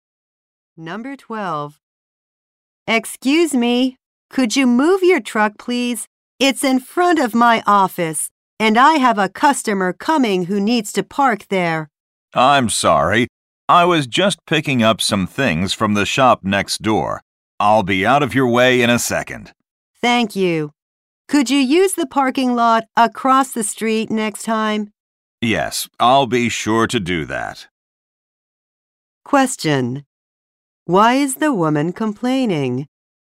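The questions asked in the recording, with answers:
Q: Why is the woman complaining?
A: The man's truck is parked in front of her office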